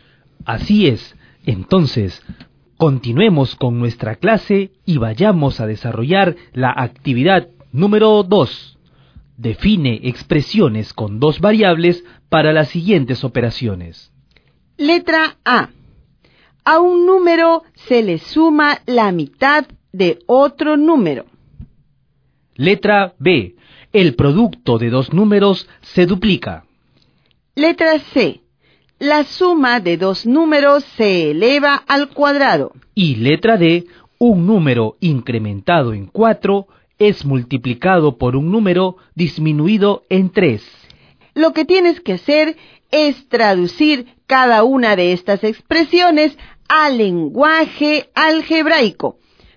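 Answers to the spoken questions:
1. (a + b)2
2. (a + 4)(b − 3)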